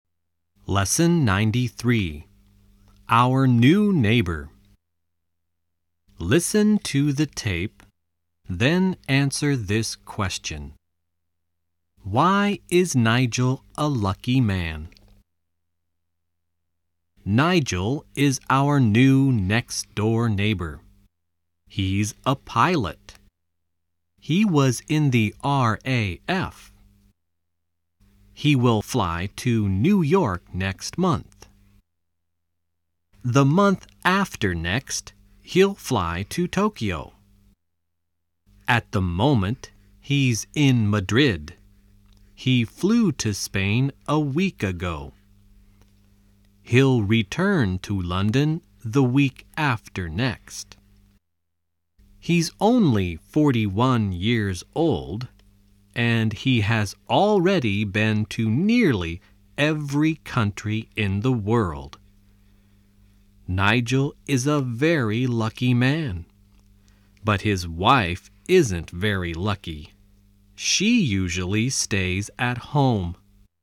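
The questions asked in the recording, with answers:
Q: Why is Nigel a lucky man?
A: Because he's a pilot and has already been to nearly every country in the world.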